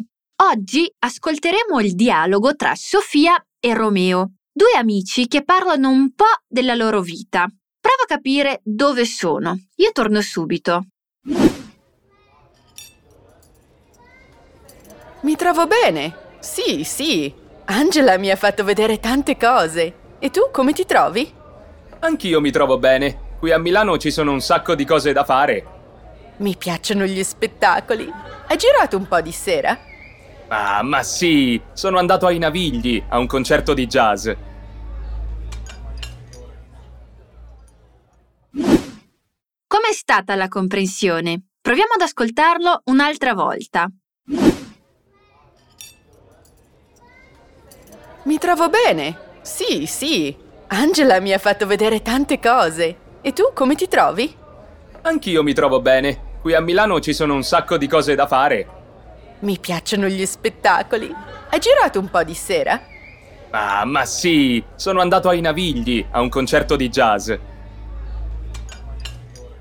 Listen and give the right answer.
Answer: Se hai detto Milano, risposta corretta.